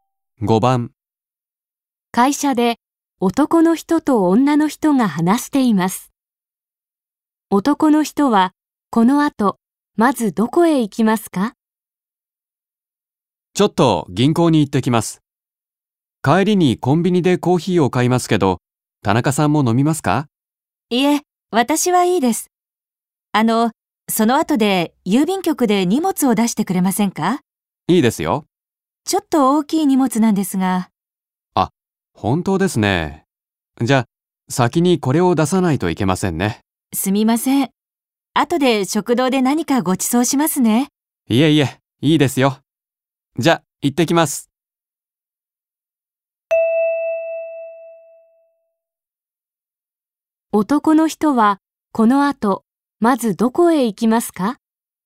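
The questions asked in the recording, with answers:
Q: 男の人は、この後、まずどこへ行きますか?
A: 郵便局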